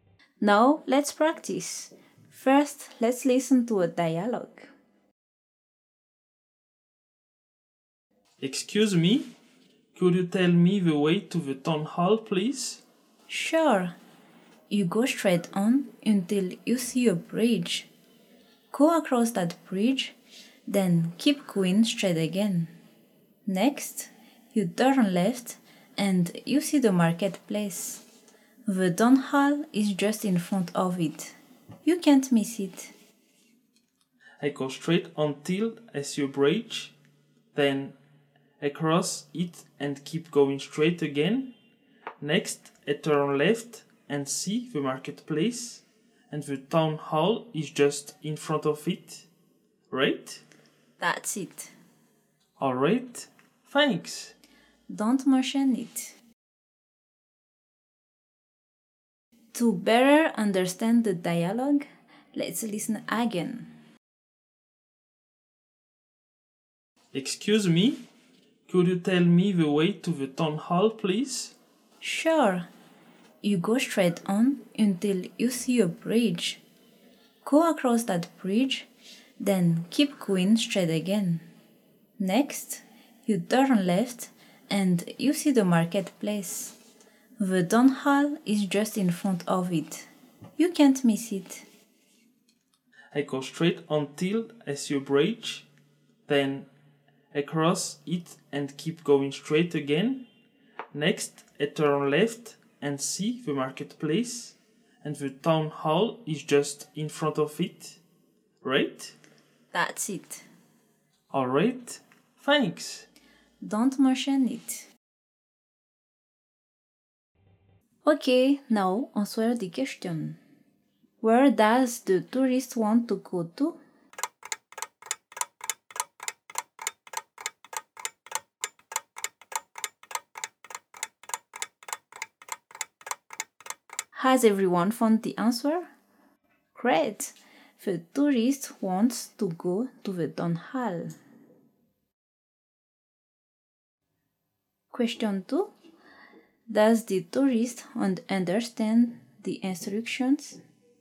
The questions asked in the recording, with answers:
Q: Does the tourist understand the instructions?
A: Yes, he does.